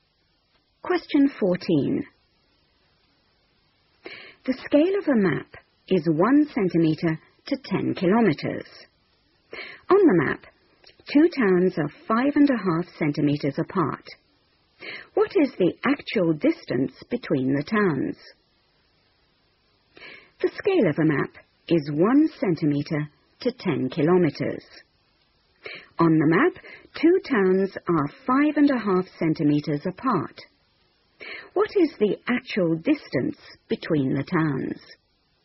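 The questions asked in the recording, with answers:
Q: What is the actual distance between the towns?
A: 55 km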